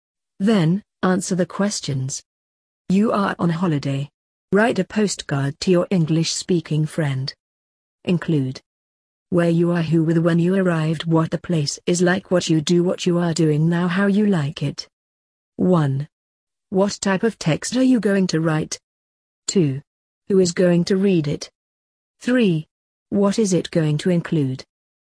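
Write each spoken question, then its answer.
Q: What type of text are you going to write?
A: A postcard

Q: Who is going to read it?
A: My English-speaking friend

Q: What is it going to include?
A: Where you are, who with, when you arrived, what the place is like, what you do, what you are doing now, how you like it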